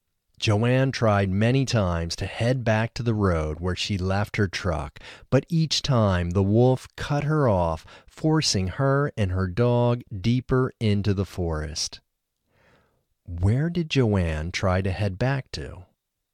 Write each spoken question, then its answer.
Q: Where did Joanne try to head back to?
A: Joanne tried to head back to the road where she left her truck.